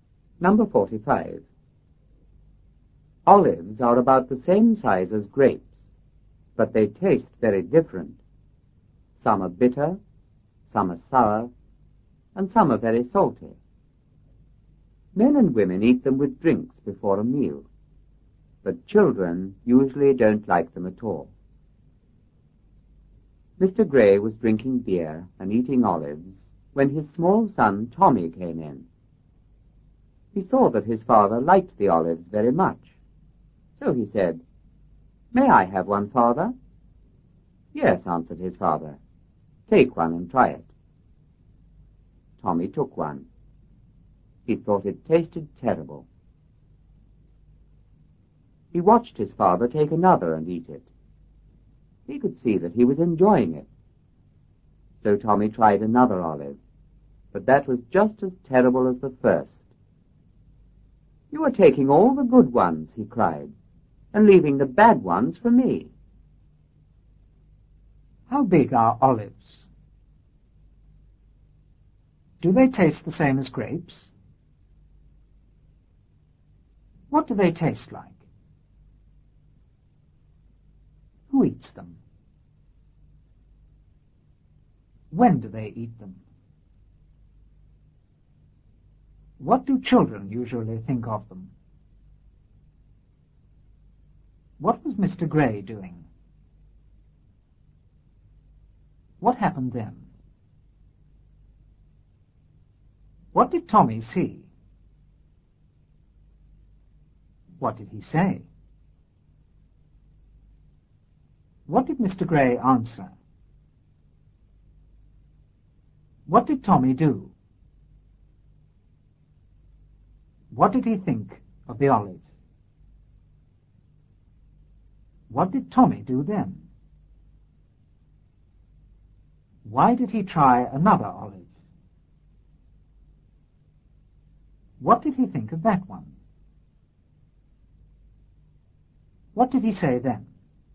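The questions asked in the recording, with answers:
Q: How big are olives?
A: About the same size as grapes

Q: Do they taste the same as grapes?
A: No, they taste very different

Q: What do they taste like?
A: Some are bitter, some sour, some very salty

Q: Who eats them?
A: Men and women

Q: When do they eat them?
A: With drinks before a meal

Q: What do children usually think of them?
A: They don't like them at all

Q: What was Mr. Gray doing?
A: Drinking beer and eating olives

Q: What happened then?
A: His small son Tommy came in

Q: What did Tommy see?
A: That his father liked the olives very much

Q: What did he say?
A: May I have one, Father?

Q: What did Mr. Gray answer?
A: Yes, take one and try it

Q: What did Tommy do?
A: He took one

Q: What did he think of the olive?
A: It tasted terrible

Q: Why did he try another olive?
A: He saw his father enjoying another one

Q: What did he think of that one?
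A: It was just as terrible as the first

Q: What did he say then?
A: You are taking all the good ones and leaving the bad ones for me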